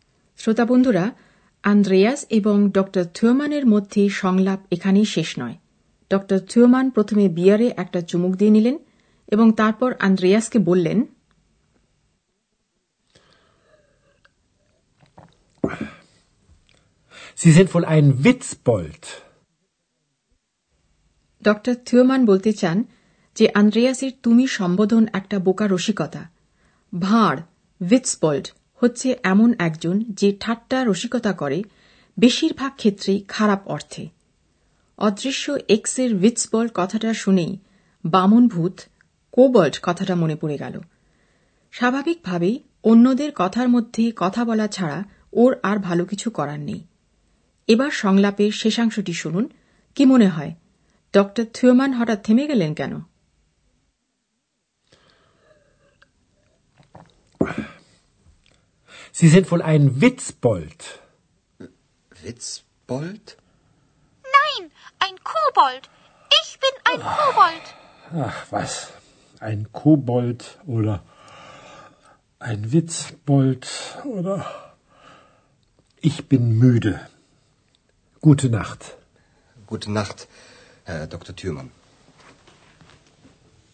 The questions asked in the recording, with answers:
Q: কি মনে হয় ড থিওমান হঠাৎ থেমে গেলেন কেন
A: Dr. Thürmann Temegelin গেলেন কারণ müde.